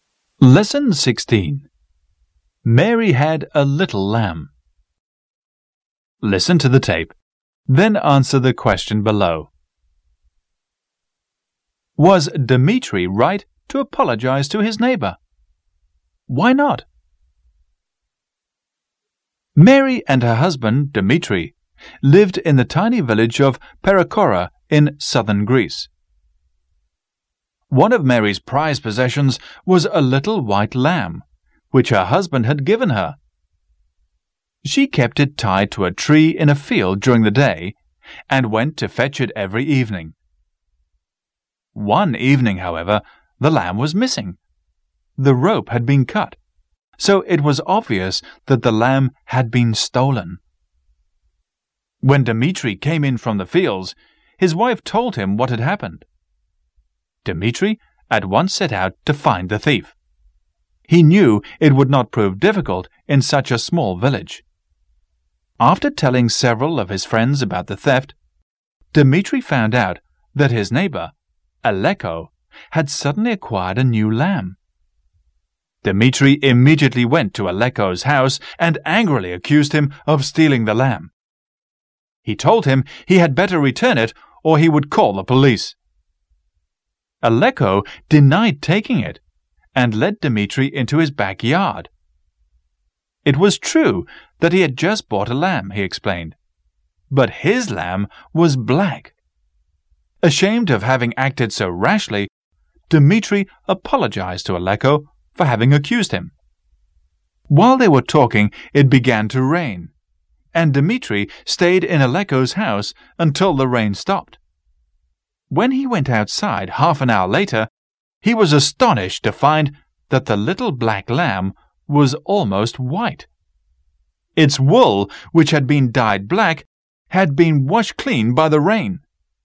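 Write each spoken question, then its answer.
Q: Was Dmitri right to apologize to his neighbor?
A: No, because Aleko had stolen the lamb and dyed it black; the rain washed the dye off and showed it was white.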